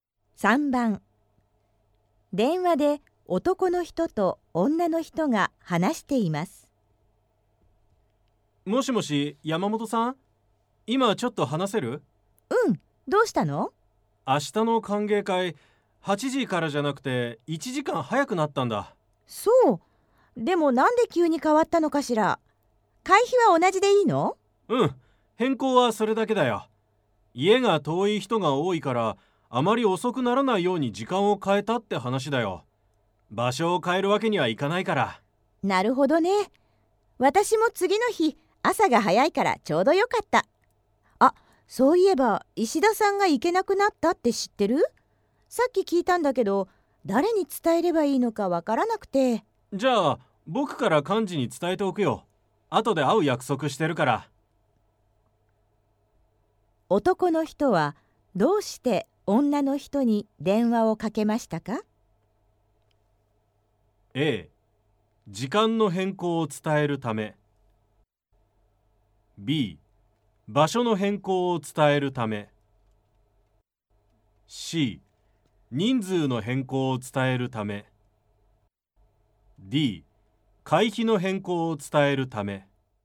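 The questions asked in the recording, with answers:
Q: 男の人はどうして女の人に電話をかけましたか?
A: A: 時間の変更を伝えるため。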